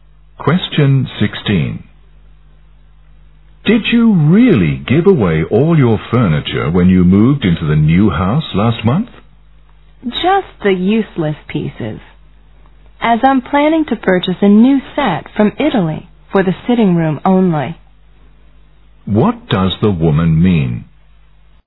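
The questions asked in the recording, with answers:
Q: What does the woman mean?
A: She gave away only the useless furniture and plans to buy a new set from Italy for the sitting room.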